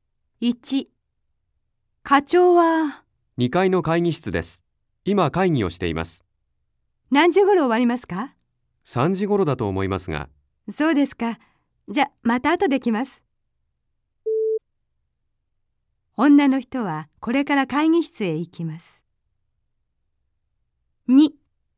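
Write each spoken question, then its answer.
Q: 女の人はこれから会議室へ行きます。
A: いいえ(×)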